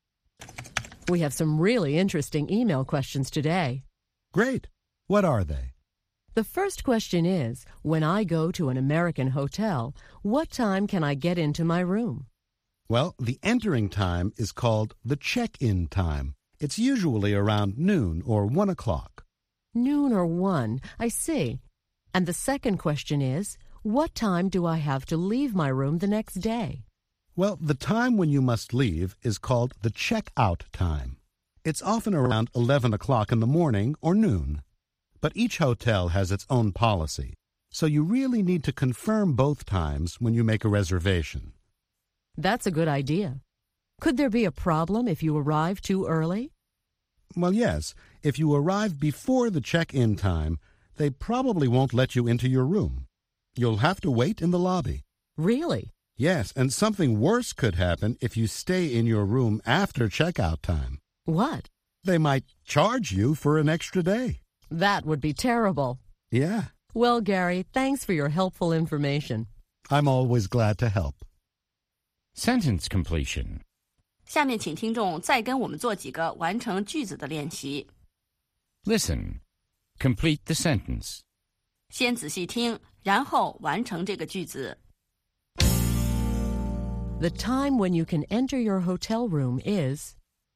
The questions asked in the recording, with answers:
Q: The time when you can enter your hotel room is...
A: The check-in time. The entering time is called the check-in time.